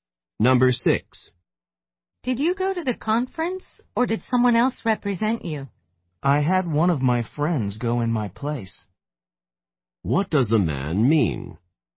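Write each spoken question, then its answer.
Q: What does the man mean?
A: A friend went to the conference in his place.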